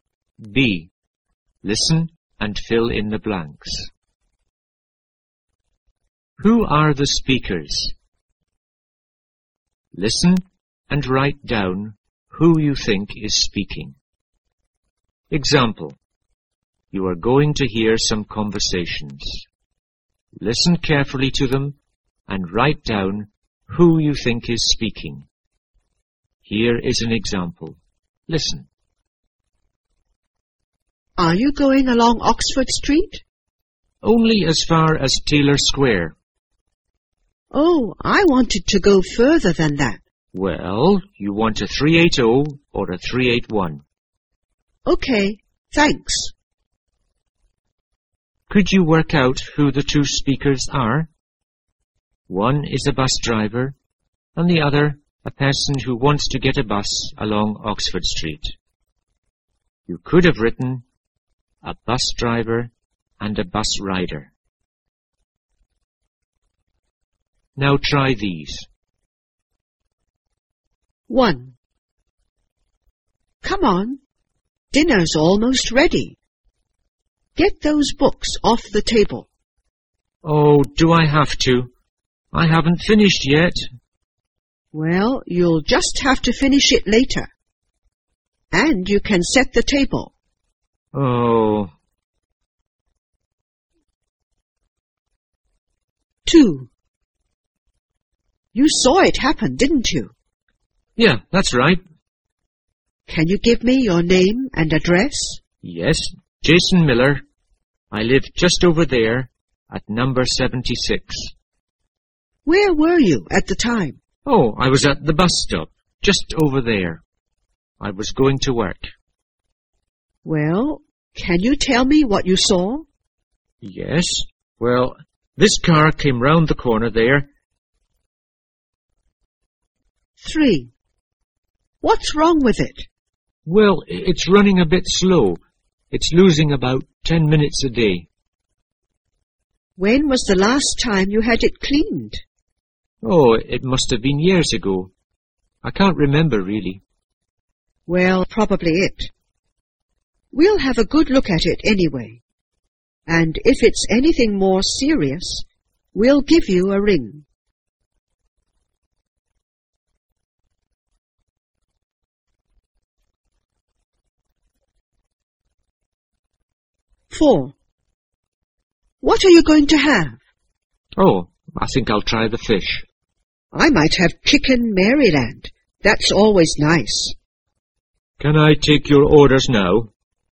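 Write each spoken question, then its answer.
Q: Who are the speakers?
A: A parent and a child

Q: Who are the speakers?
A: A police officer and a witness

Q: Who are the speakers?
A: Two diners and a waiter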